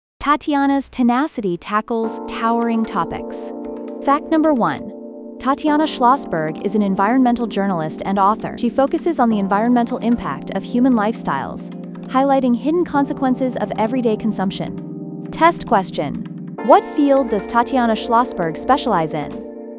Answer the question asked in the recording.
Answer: Environmental journalism.